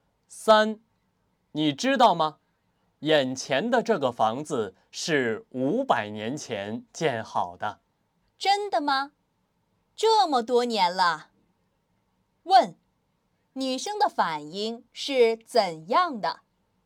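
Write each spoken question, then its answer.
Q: 女生的反应是怎样的?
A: 很惊讶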